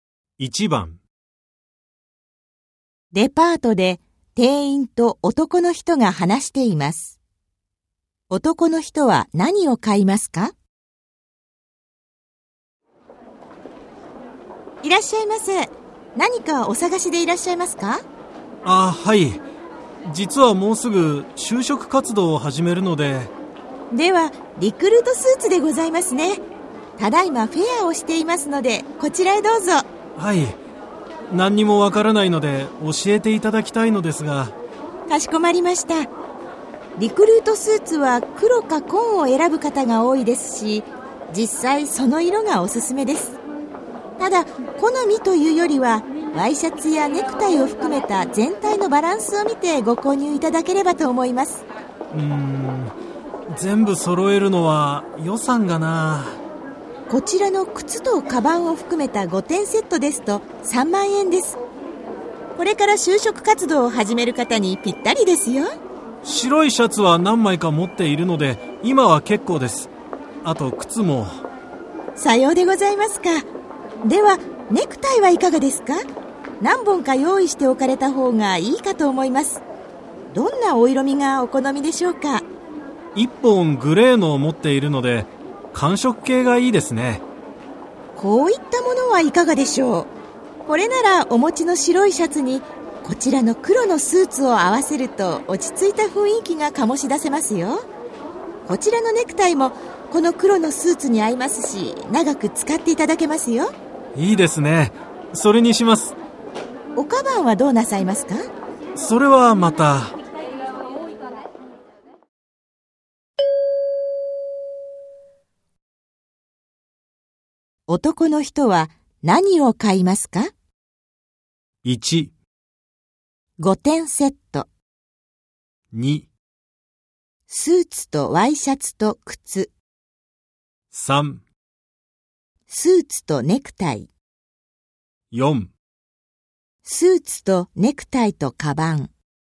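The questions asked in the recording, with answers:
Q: 男の人は何を買いますか?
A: 3: スーツとネクタイ。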